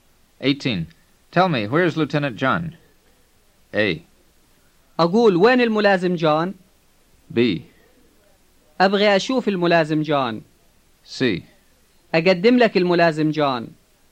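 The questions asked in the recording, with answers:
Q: Tell me, where is Lieutenant John?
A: A: أقول وين الملازم جون؟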